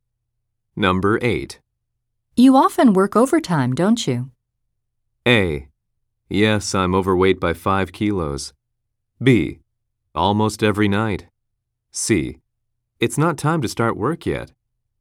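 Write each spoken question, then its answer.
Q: You often work overtime, don't you?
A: B: Almost every night.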